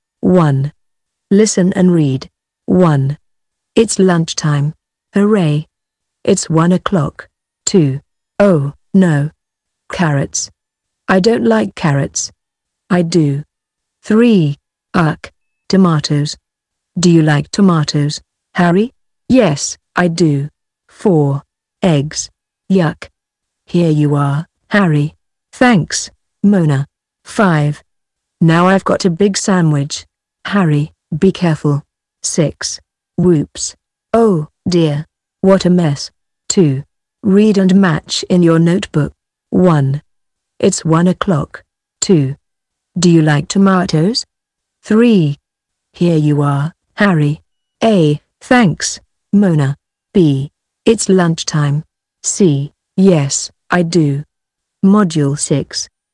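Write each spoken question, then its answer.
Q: It's 1 o'clock.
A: B: It's lunchtime.

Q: Do you like tomatoes?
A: C: Yes, I do.

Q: Here you are, Harry.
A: A: Thanks, Mona.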